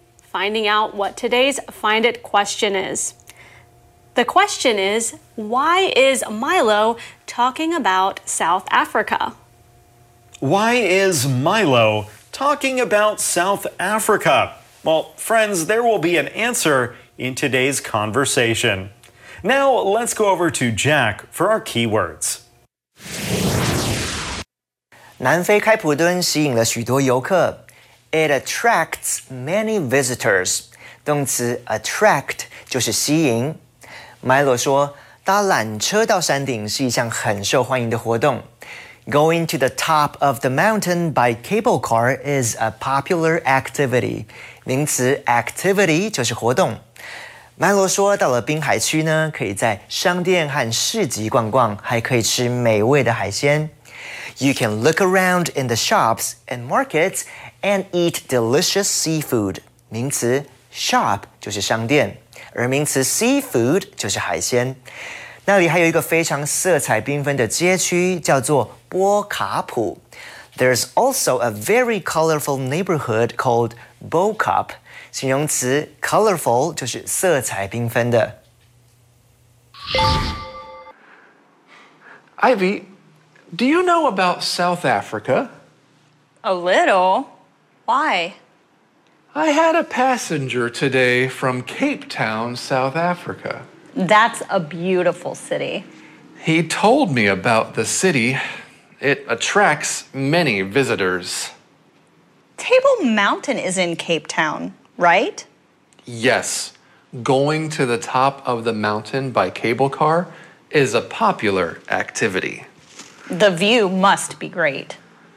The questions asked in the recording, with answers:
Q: why is Milo talking about South Africa?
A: Because he had a passenger today from South Africa.